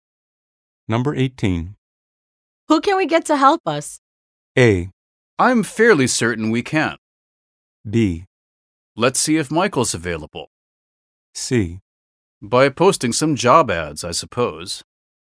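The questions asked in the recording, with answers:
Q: Who can we get to help us?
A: B: Let's see if Michael's available.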